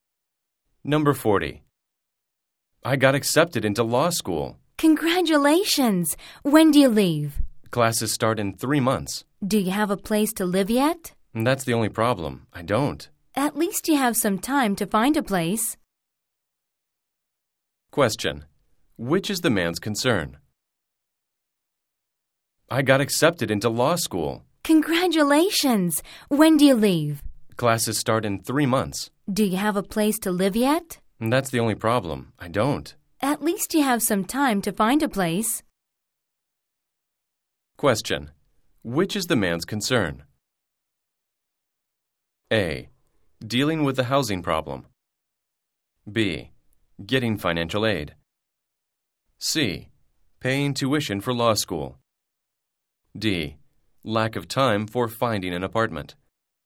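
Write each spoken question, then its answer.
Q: Which is the man's concern?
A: A: Dealing with the housing problem.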